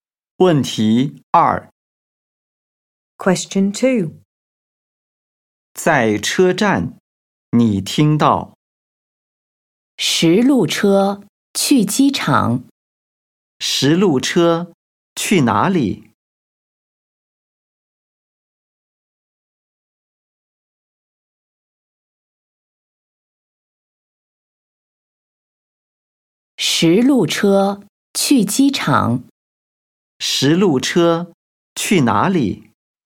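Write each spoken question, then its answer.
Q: 十路车去哪里?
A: 机场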